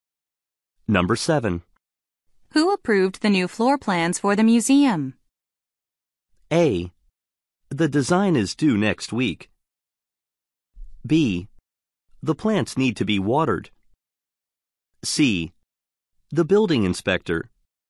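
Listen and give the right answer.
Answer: C: The building inspector.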